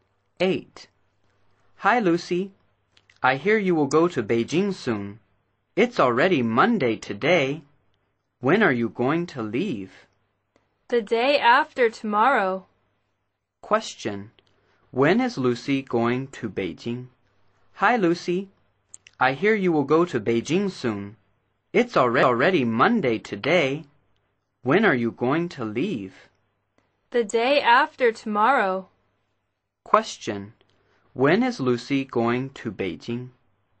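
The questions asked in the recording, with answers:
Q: When is Lucy going to Beijing?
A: On Wednesday (the day after tomorrow)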